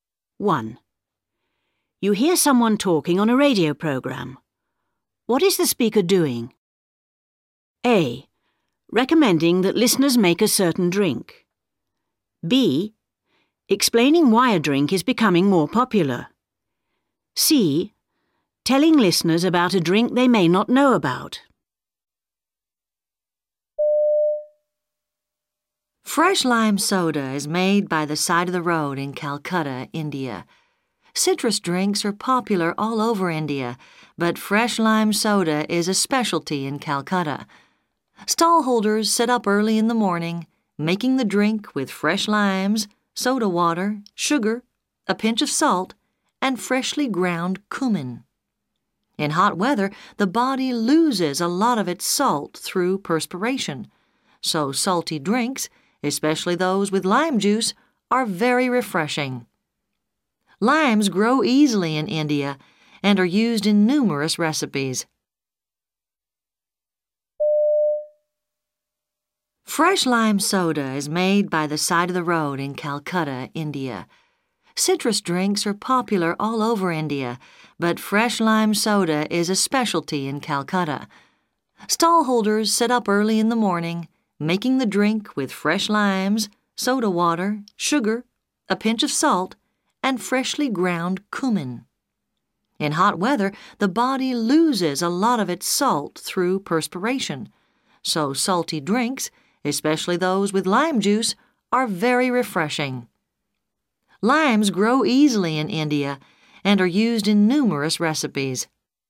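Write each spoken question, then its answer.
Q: What is the speaker doing?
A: C: Telling listeners about a drink they may not know about.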